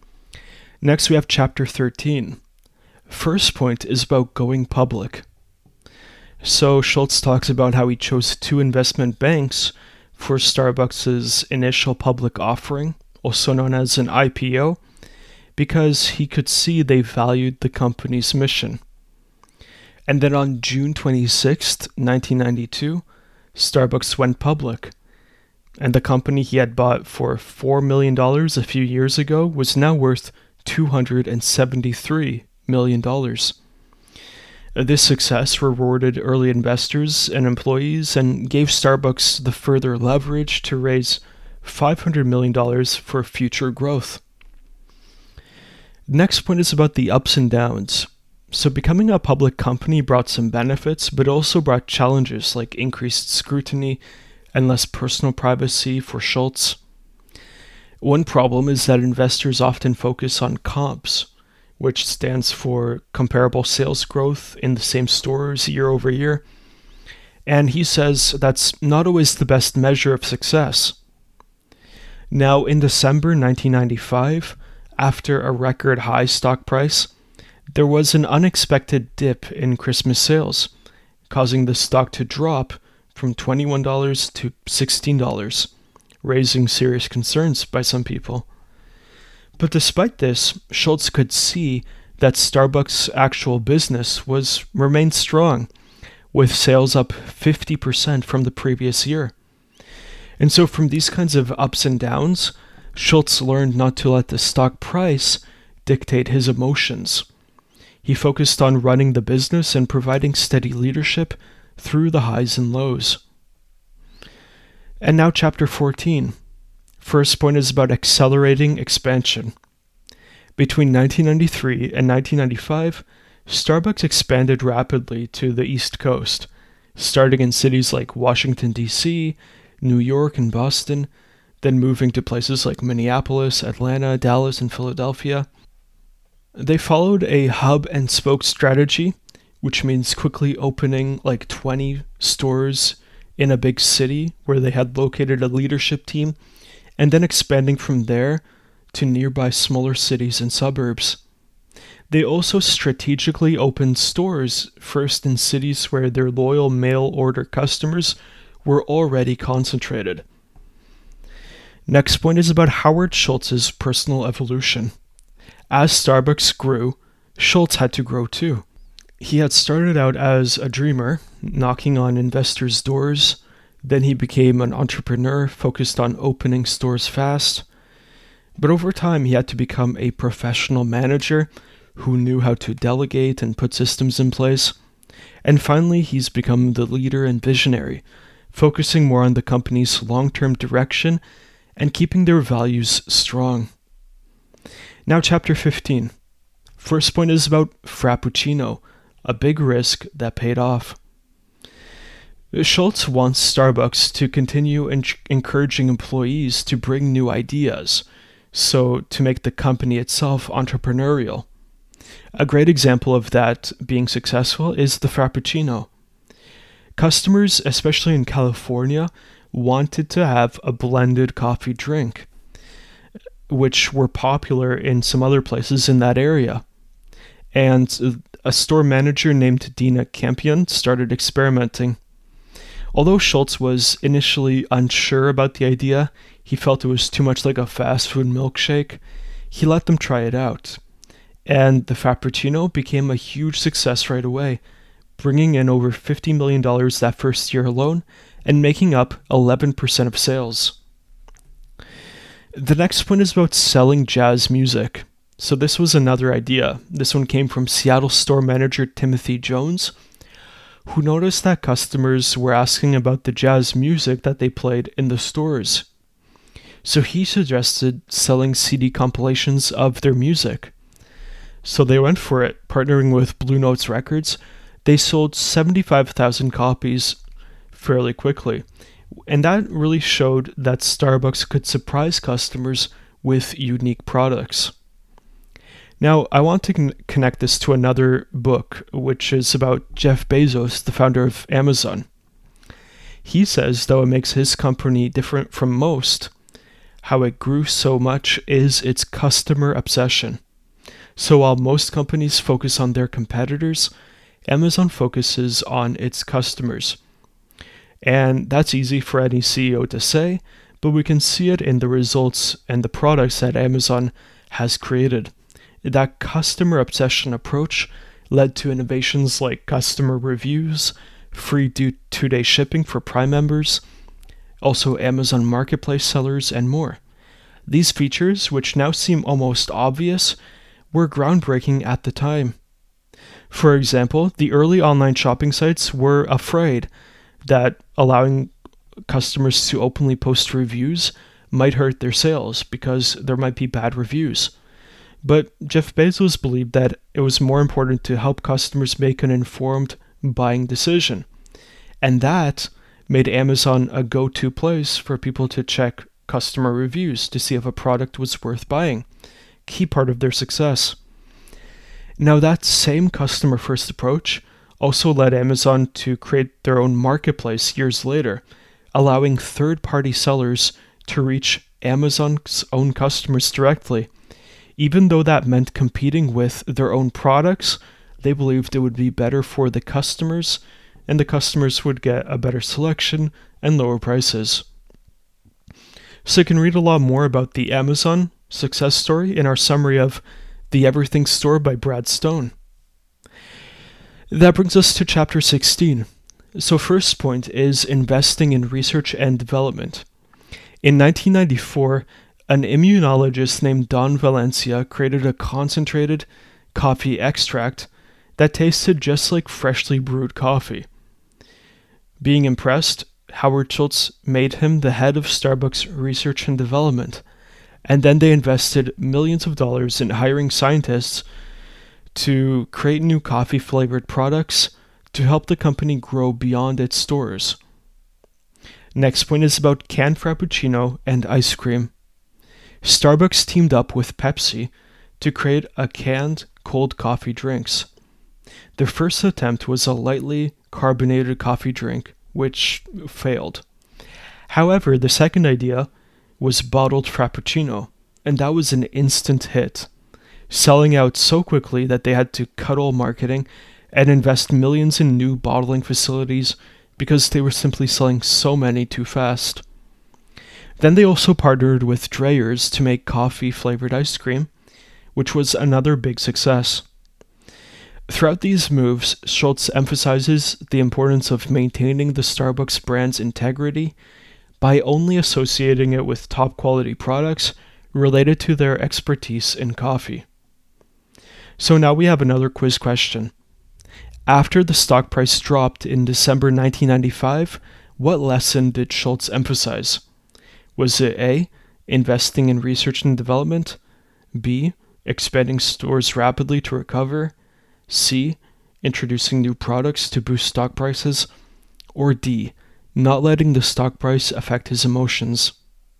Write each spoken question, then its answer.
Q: After the stock price dropped in December 1995, what lesson did Schultz emphasize?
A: Correct answer here is D, not letting the stock price affect his emotions despite the ups and downs.